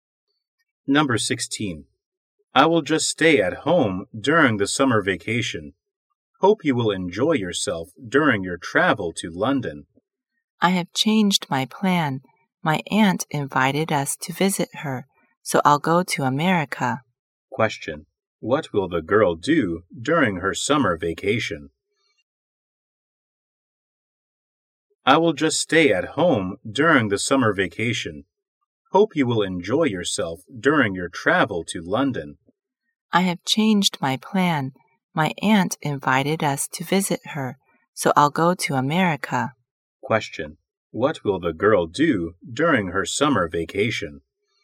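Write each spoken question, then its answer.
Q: what will the girl do during her summer vacation?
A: Go to America to visit her aunt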